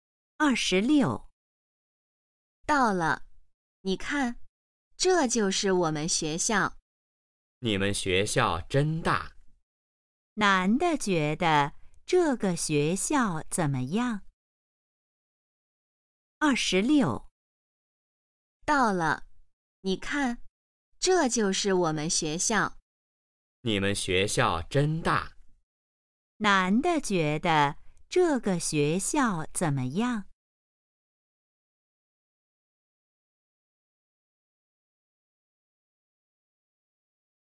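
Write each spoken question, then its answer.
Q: 男的觉得这个学校怎么样?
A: 很大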